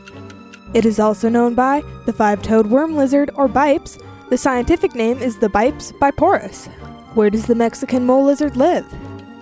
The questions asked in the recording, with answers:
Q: Where does the Mexican mole lizard live?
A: It lives in the Baja California Peninsula.